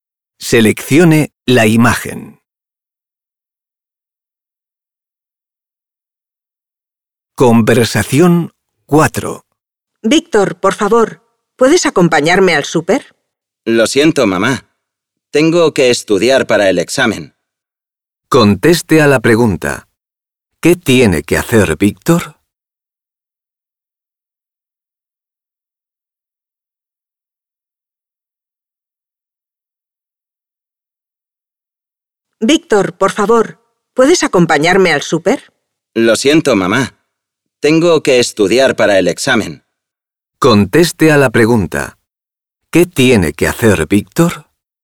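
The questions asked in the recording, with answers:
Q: ¿Qué tiene que hacer Víctor?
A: Estudiar para el examen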